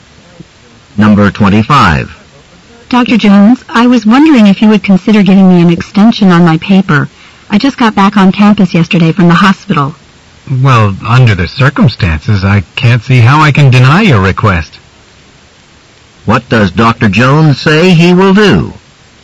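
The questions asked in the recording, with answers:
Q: What does Dr. Jones say he will do?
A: Give the student an extension on the paper.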